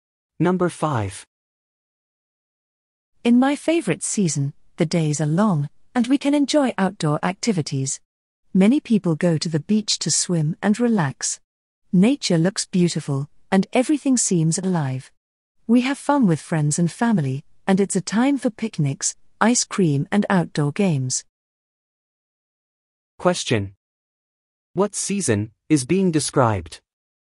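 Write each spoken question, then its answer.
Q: What season is being described?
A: Summer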